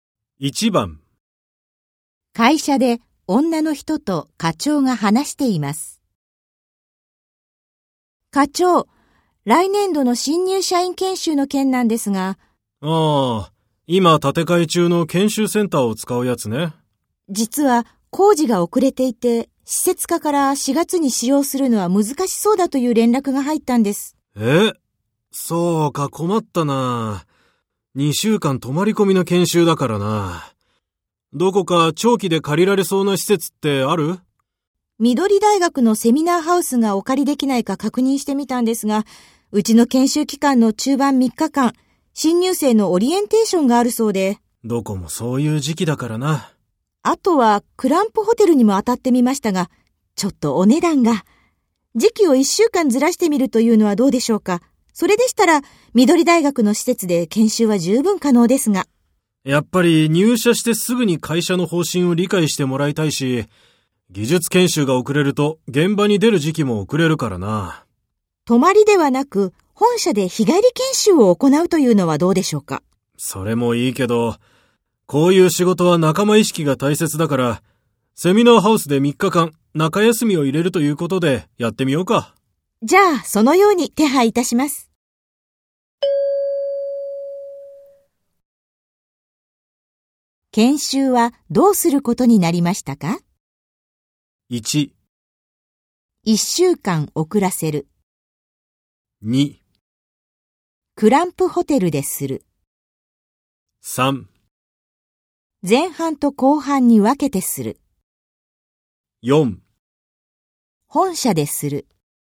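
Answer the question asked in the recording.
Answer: 3: 前半と後半に分けてする。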